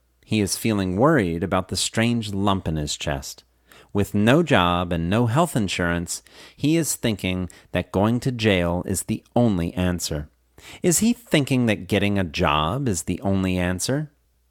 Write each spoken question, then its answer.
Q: Is he thinking that getting a job is the only answer?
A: No, he isn't thinking that getting a job is the only answer.